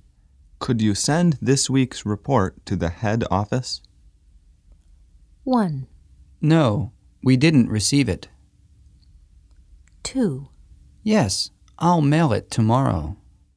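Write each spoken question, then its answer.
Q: Could you send this week's report to the head office?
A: 2: Yes, I'll mail it tomorrow.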